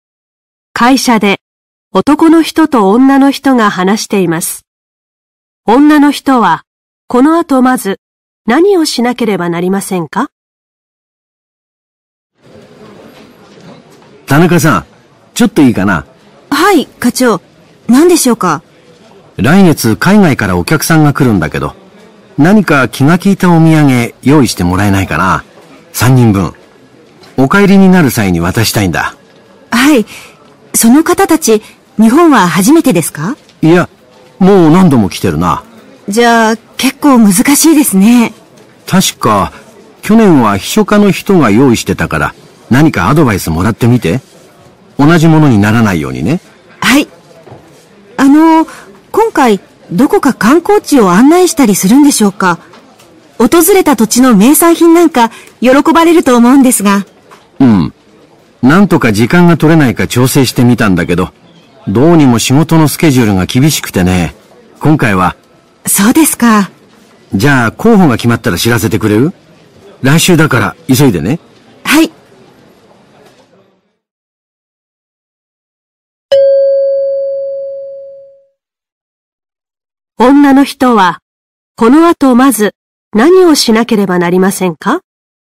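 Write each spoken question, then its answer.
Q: 女の人は、この後まず、何をしなければなりませんか?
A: 秘書課の人にアドバイスをもらう(去年のお土産について聞く)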